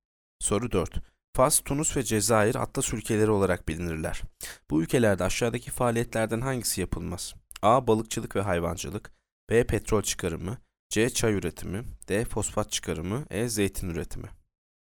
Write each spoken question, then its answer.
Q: Bu ülkelerde aşağıdaki faaliyetlerden hangisi yapılmaz?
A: Yanıt C. Çay üretimi.